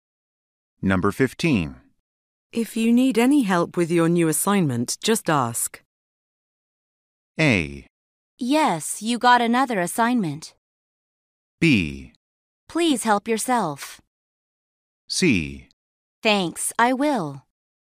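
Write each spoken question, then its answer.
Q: If you need any help with your new assignment, just ask.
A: C: Thanks, I will.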